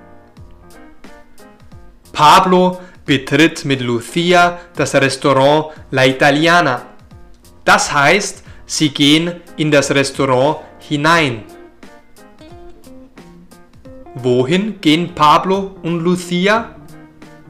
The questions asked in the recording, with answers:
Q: Wohin gehen Pablo und Lucia?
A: in das Restaurant. Sie gehen in das Restaurant hinein.